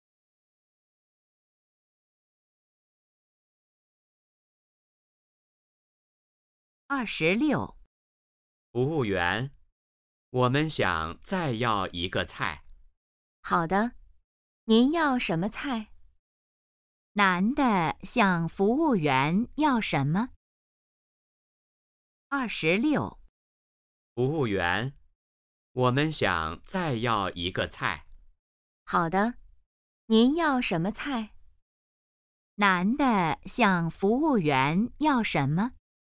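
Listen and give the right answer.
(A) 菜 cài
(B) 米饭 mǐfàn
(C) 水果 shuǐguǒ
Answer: (A) 菜 cài

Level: HSK2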